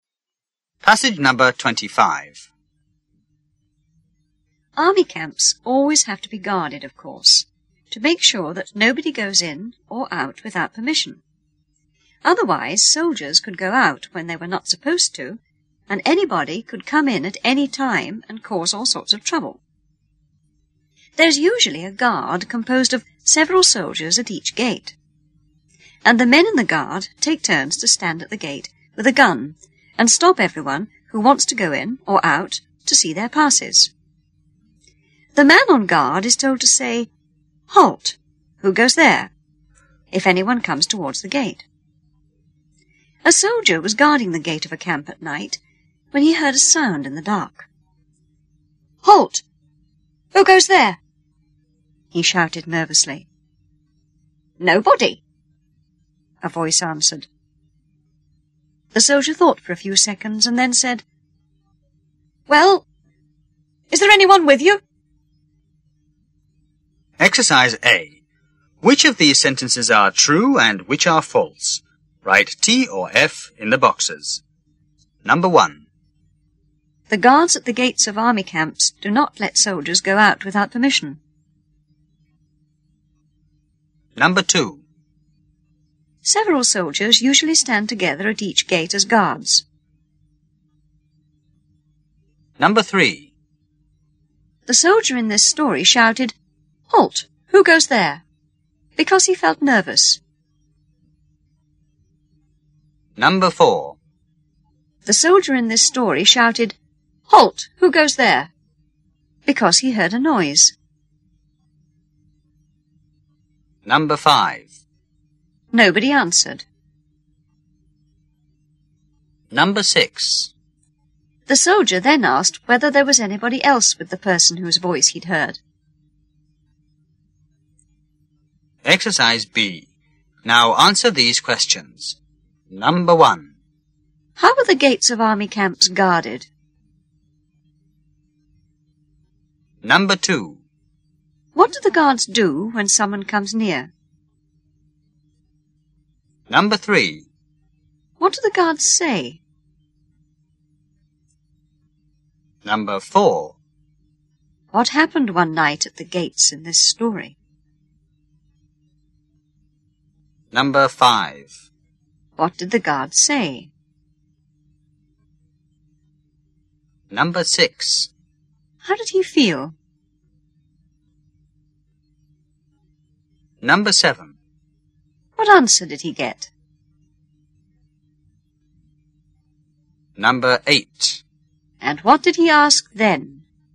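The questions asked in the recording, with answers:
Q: The guards at the gates of army camps do not let soldiers go out without permission.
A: True

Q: Several soldiers usually stand together at each gate as guards.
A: False

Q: The soldier in this story shouted, "Halt! Who goes there?" because he heard a noise.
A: True

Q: Nobody answered.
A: False

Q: The soldier then asked whether there was anybody else with the person whose voice he'd heard.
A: True

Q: How are the gates of army camps guarded?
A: By a guard of several soldiers who take turns to stand at the gate with a gun.

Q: What do the guards do when someone comes near?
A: They stop them to see their passes.

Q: What do the guards say?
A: "Halt! Who goes there?"

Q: What happened one night at the gates in this story?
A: A soldier on guard heard a sound in the dark.

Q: What did the guard say?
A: "Halt! Who goes there?"

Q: How did he feel?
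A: Nervous.

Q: What answer did he get?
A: "Nobody."

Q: And what did he ask then?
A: "Well, is there anyone with you?"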